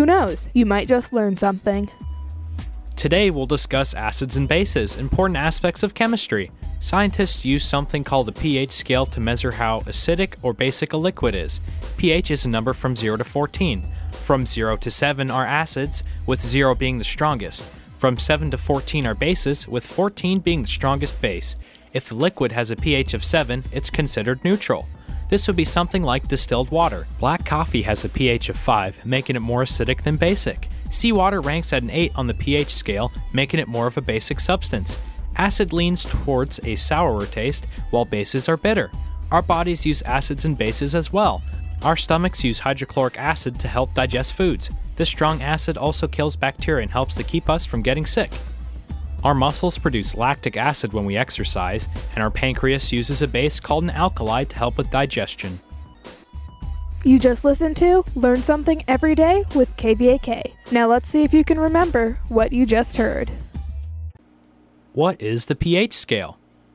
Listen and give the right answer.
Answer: The pH scale is a measurement of how acidic or basic a substance is.